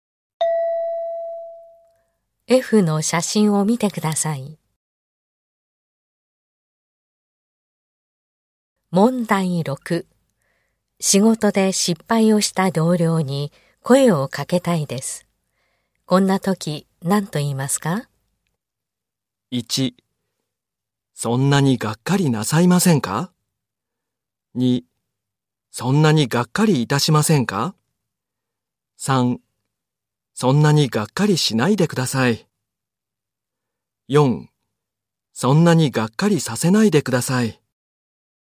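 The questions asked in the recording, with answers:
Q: 仕事で失敗をした同僚に声をかけたいです。こんな時何と言いますか?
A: 2: そんなにがっかりしないでください。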